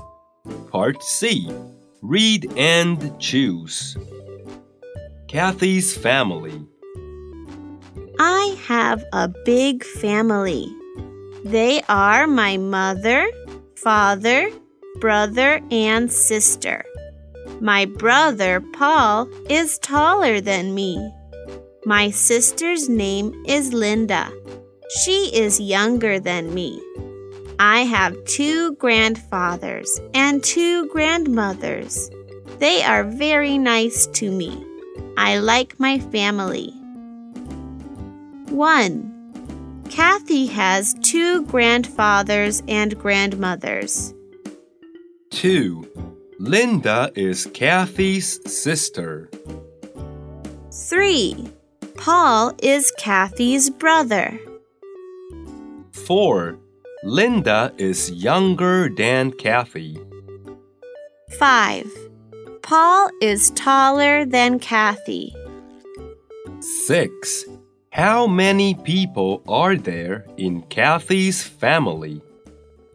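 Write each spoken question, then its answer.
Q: Kathy has 2 grandfathers and grandmothers.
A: True

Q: Linda is Kathy's sister.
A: True

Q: Paul is Kathy's brother.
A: True

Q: Linda is younger than Kathy.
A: True

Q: Paul is taller than Kathy.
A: True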